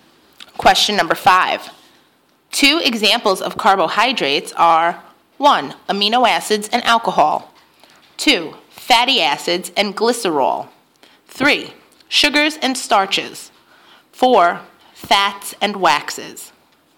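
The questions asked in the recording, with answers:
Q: Two examples of carbohydrates are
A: 3: sugars and starches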